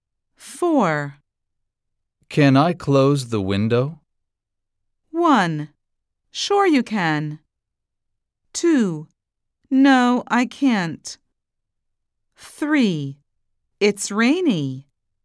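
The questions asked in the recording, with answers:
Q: Can I close the window?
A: 1: Sure you can.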